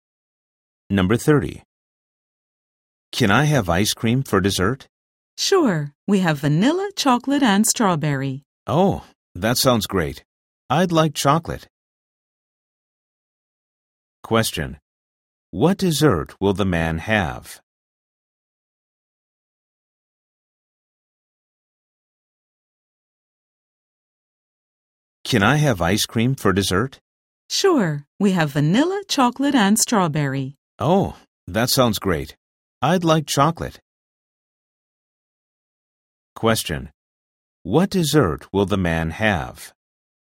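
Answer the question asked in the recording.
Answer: Chocolate ice cream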